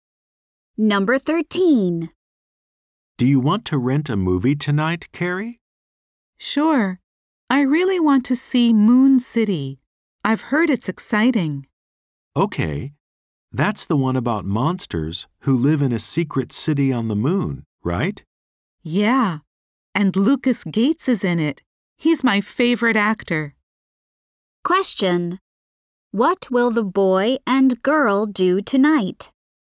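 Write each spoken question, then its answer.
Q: What will the boy and girl do tonight?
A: Rent a movie (Moon City)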